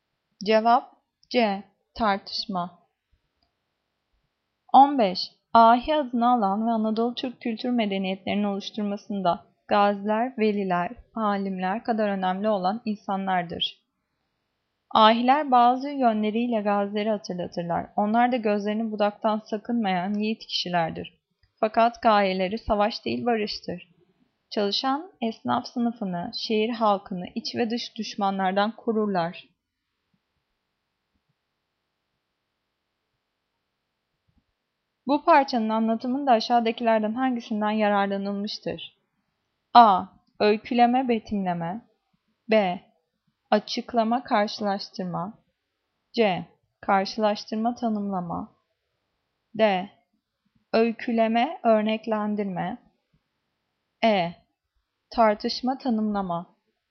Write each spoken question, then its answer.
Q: Bu parçanın anlatımında aşağıdakilerden hangisinden yararlanılmıştır?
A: Cevap B. Açıklama, karşılaştırma.